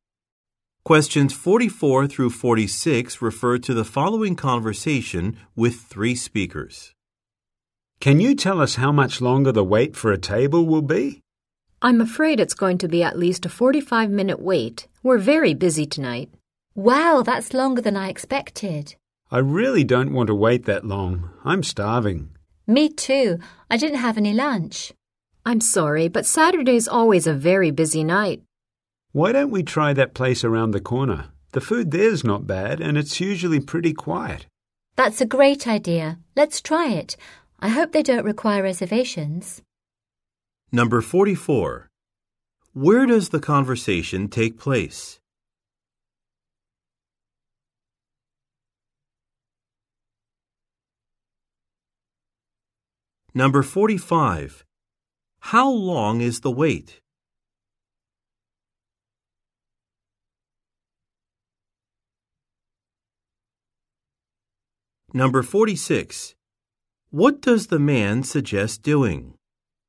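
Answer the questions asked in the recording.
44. At a restaurant
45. At least 45 minutes
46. Trying the place around the corner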